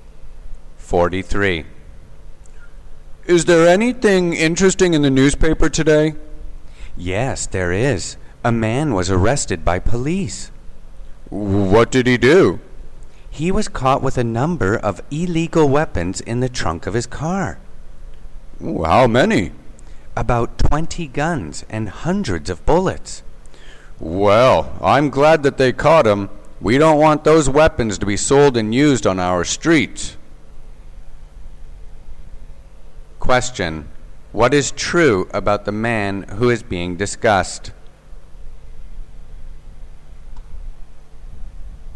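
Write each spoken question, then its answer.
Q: What is true about the man who is being discussed?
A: He was arrested with illegal weapons (about 20 guns and hundreds of bullets) in his car trunk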